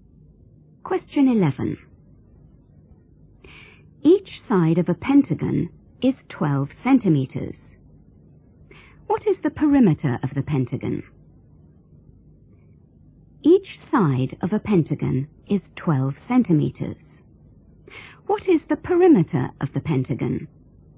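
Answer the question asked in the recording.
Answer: 60 centimeters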